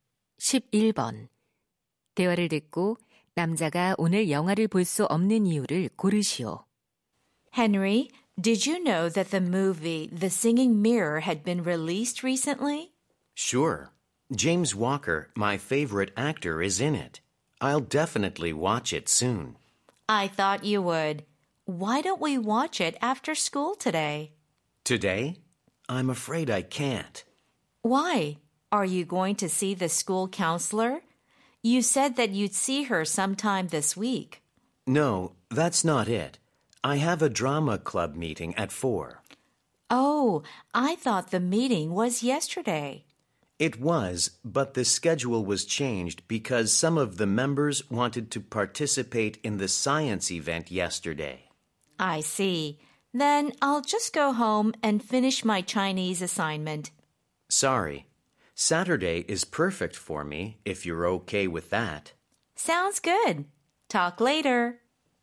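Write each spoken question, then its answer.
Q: 대화를 듣고 남자가 오늘 영화를 볼 수 없는 이유를 고르시오.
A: 연극 동아리 모임이 있어서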